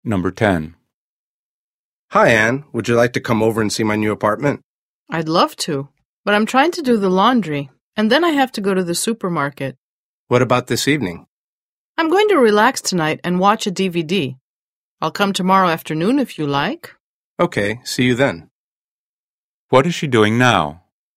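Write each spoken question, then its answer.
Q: What is she doing now?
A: doing the laundry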